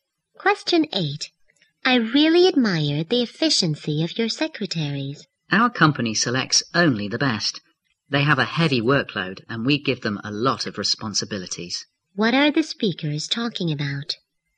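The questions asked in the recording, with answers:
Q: What are the speakers talking about?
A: The company's efficient secretaries.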